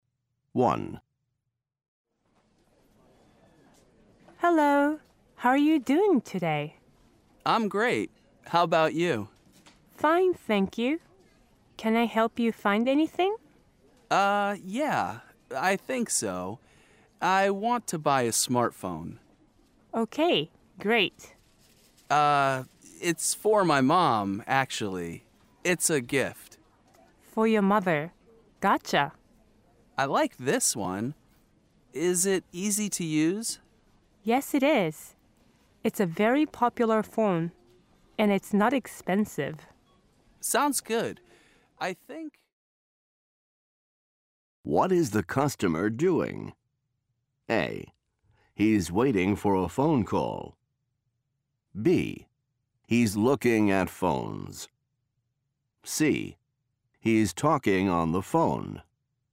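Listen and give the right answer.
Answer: B: He's looking at phones.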